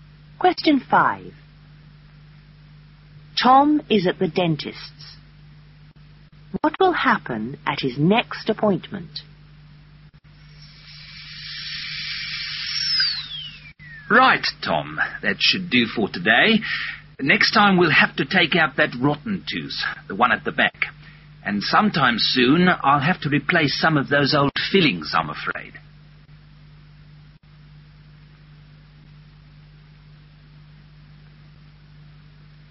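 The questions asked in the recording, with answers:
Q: What will happen at his next appointment?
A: His rotten back tooth will be taken out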